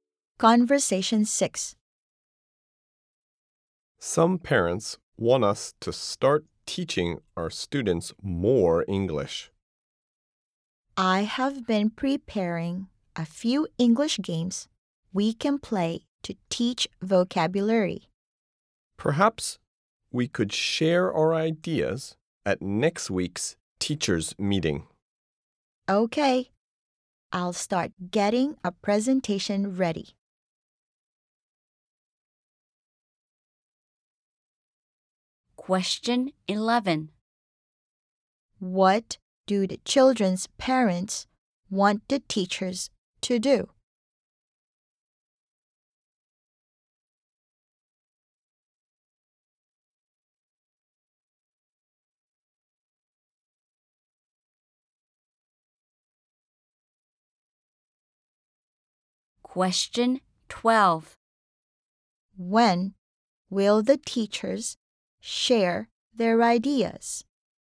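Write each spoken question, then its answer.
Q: What do the children's parents want the teachers to do?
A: Teach the students more English

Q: When will the teachers share their ideas?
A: At next week's teachers' meeting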